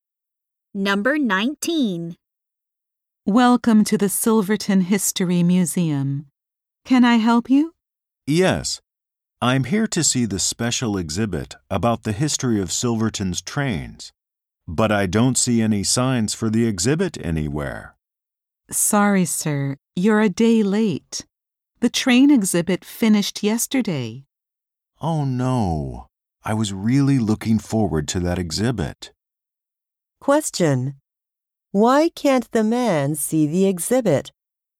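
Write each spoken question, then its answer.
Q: Why can't the man see the exhibit?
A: The exhibit finished yesterday.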